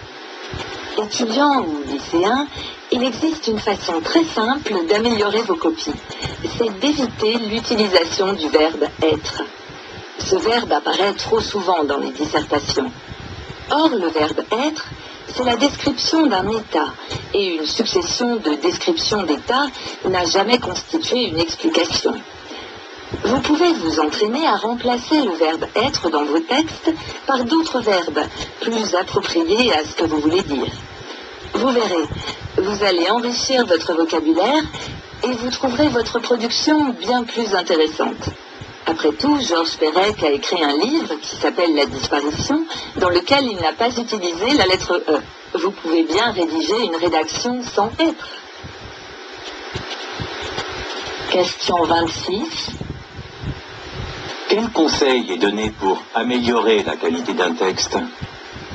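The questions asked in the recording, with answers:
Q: Quel conseil est donné pour améliorer la qualité d'un texte ?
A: Éviter d'utiliser le verbe « être » et le remplacer par des verbes plus appropriés.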